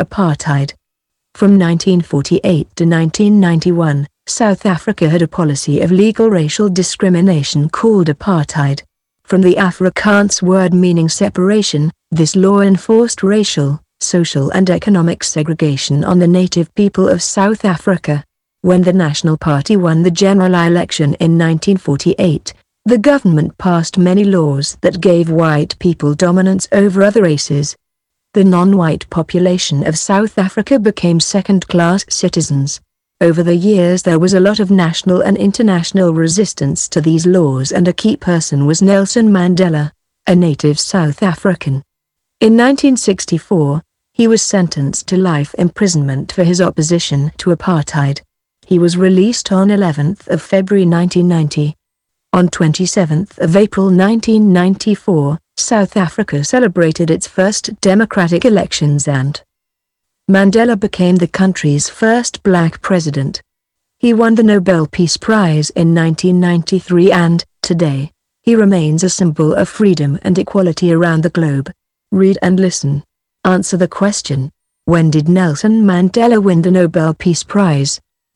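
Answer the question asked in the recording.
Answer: In 1993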